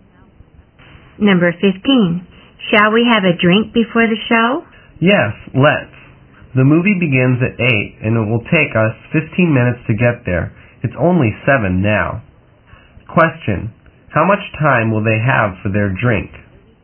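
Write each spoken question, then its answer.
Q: How much time will they have for their drink?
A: 45 minutes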